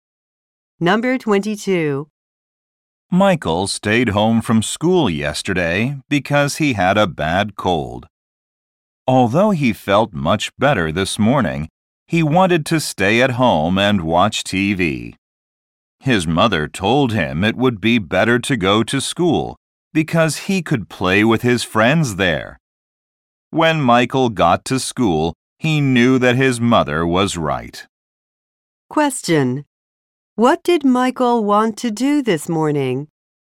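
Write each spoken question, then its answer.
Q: What did Michael want to do this morning?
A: Stay at home and watch TV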